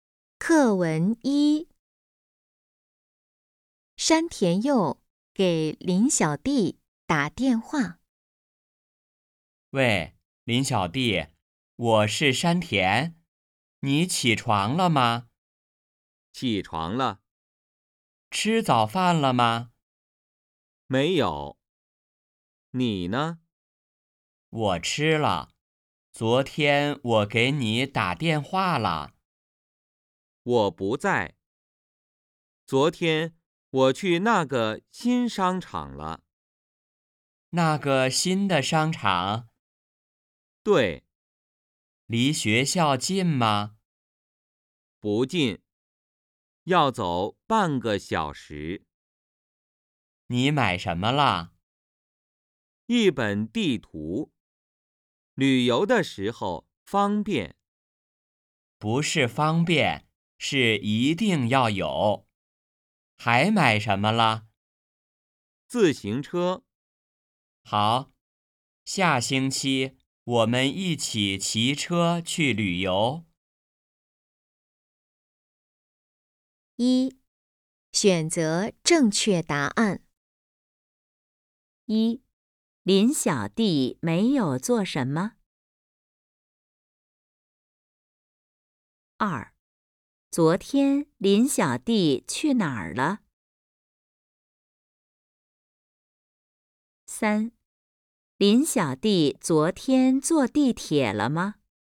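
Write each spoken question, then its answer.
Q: 昨天林小弟去哪儿了?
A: 那个新商场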